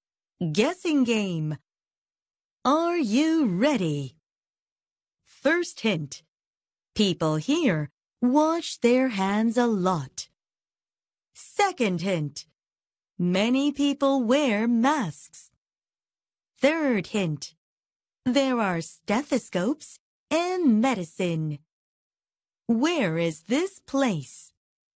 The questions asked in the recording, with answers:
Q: Where is this place?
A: The answer is hospital.